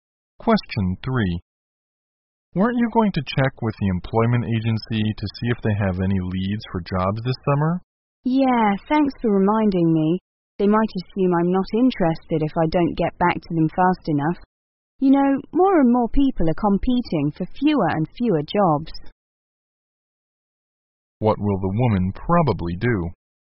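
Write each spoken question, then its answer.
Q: What will the woman probably do?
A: Contact the employment agency soon.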